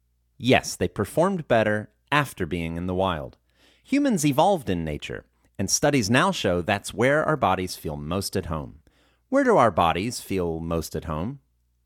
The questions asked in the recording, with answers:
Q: Where do our bodies feel most at home?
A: Our bodies feel most at home in nature.